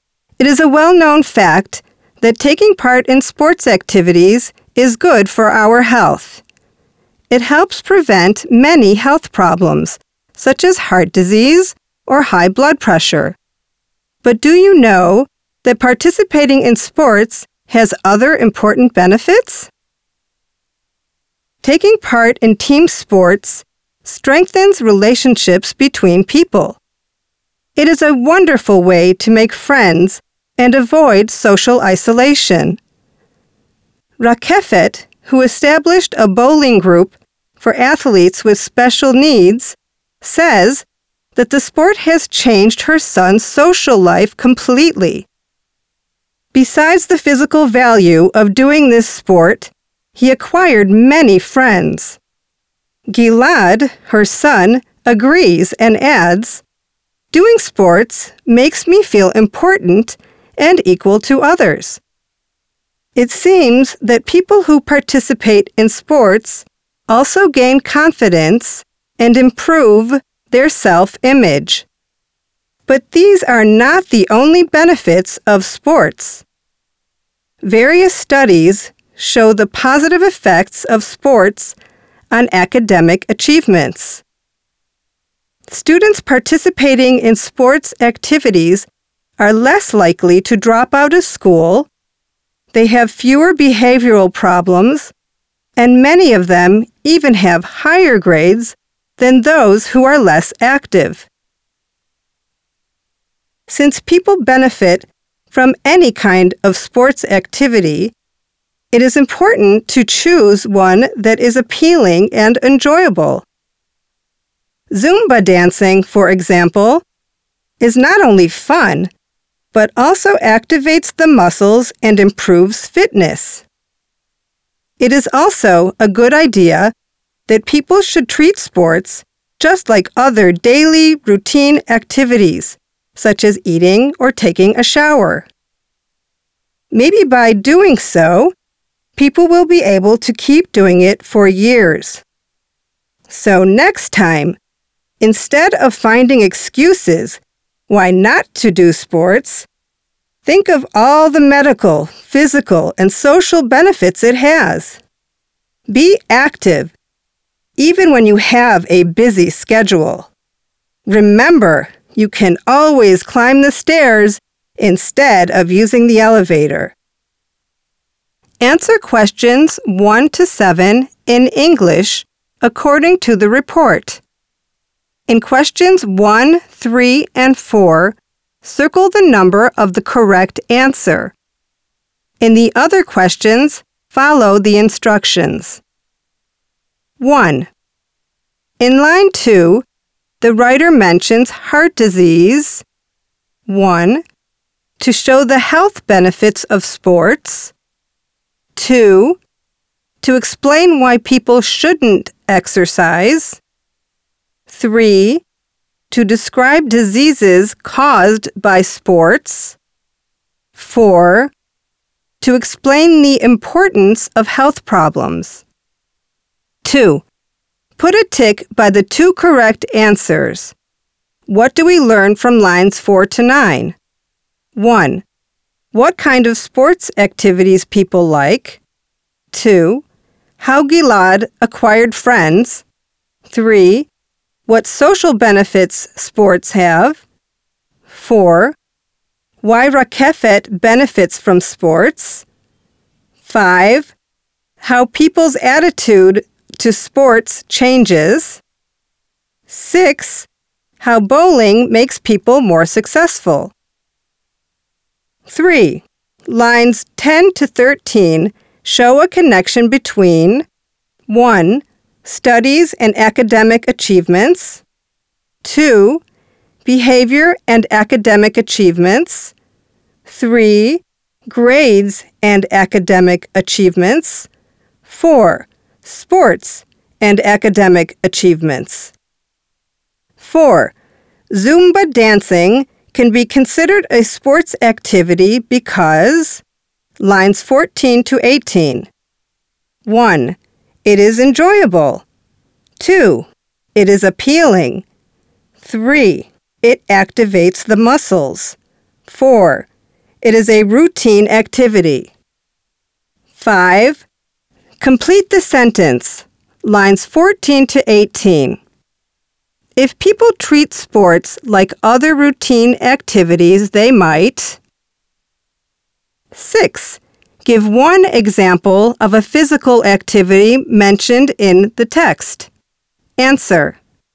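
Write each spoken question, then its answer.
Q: In line 2, the writer mentions heart disease.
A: 1: To show the health benefits of sports.

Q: What do we learn from lines 4 to 9?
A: 2: How Gilad acquired friends; 3: What social benefits sports have

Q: Lines 10 to 13 show a connection between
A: 4: Sports and academic achievements

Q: Zumba dancing can be considered a sports activity because...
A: 3: It activates the muscles.

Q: If people treat sports like other routine activities, they might...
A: be able to keep doing it for years

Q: Give one example of a physical activity mentioned in the text.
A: bowling / Zumba dancing / climbing the stairs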